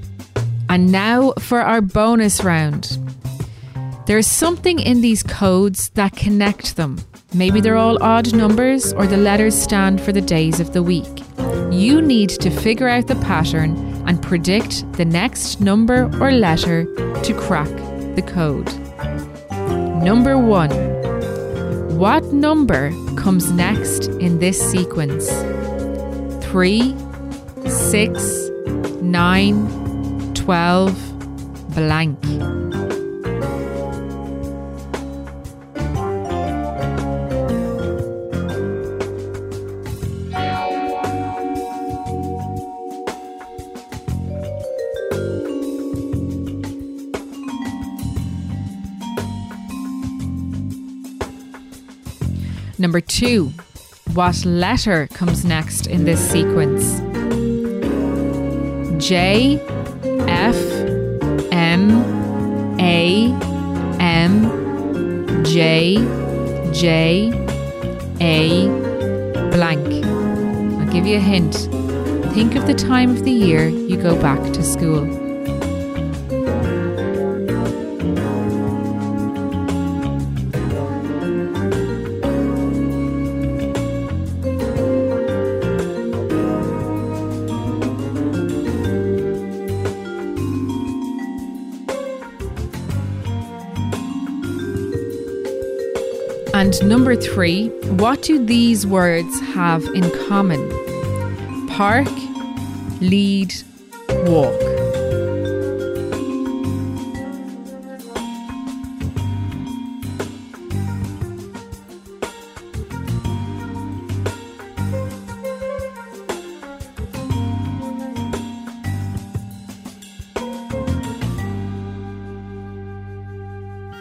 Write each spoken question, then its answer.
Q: What number comes next in this sequence?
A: The answer is 15.

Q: what letter comes next in this sequence?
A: The answer is S, because all of those letters stand for the months of the year.